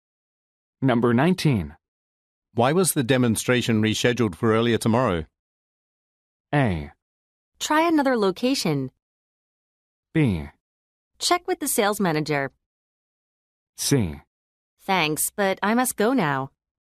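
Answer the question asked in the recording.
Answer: B: Check with the sales manager.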